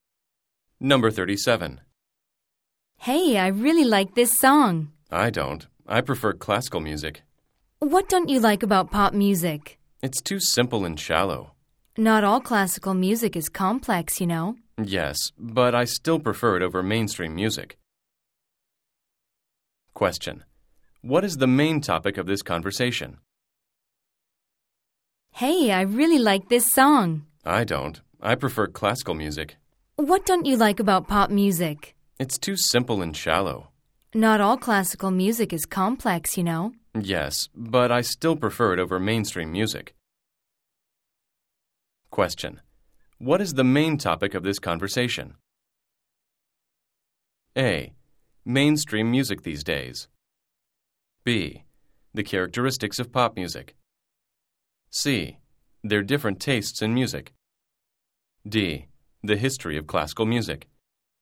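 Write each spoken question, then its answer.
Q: What is the main topic of this conversation?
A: C: Their different tastes in music.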